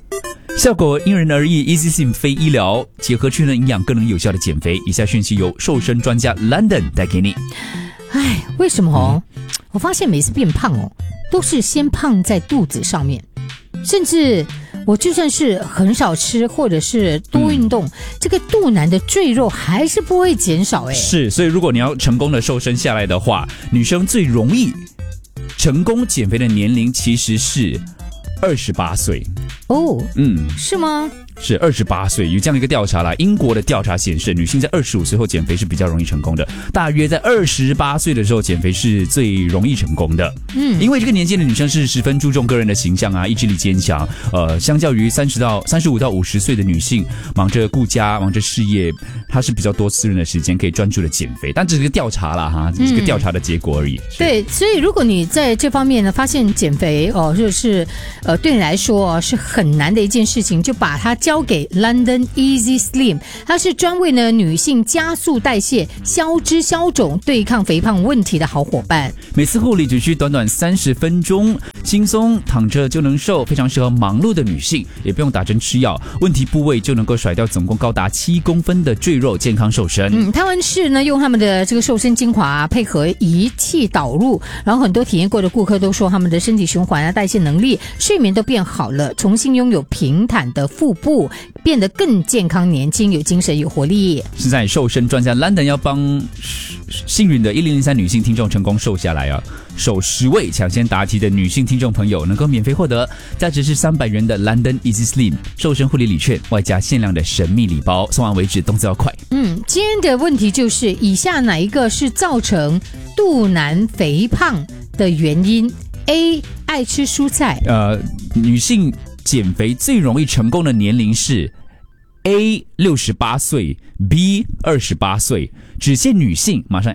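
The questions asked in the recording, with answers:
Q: 减肥最容易成功的年龄是 A 68岁 ,B 28岁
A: B: 28岁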